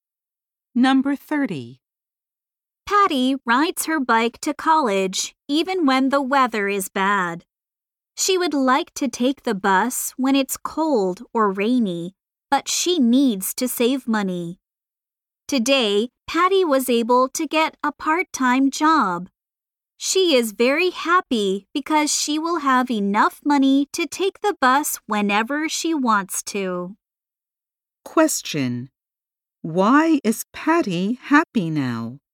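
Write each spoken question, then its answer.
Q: Why is Patty happy now?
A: She got a part-time job, so she can take the bus whenever she wants.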